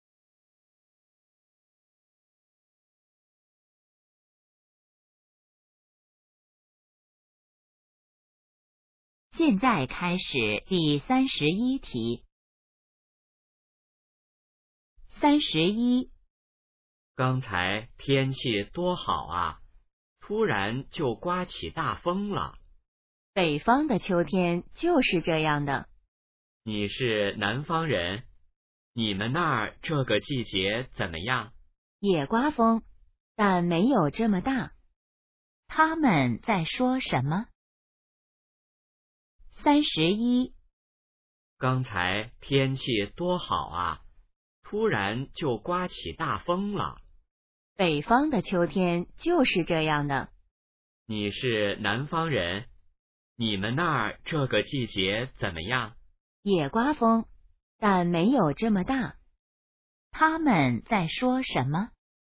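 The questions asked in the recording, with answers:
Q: 他们在说什么?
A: 天气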